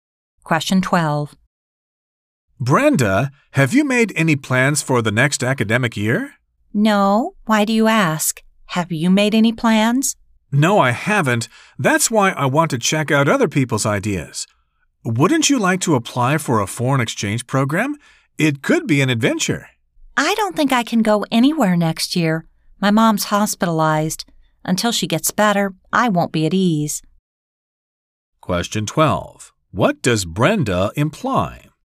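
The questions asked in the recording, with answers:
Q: What does Brenda imply?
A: She won't go on an exchange program next year because her mother is in the hospital.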